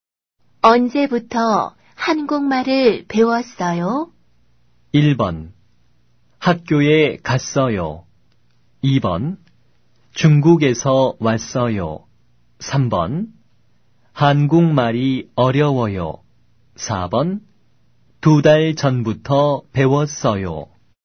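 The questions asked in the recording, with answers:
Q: 언제부터 한국말을 배웠어요?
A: 4: 두 달 전부터 배웠어요.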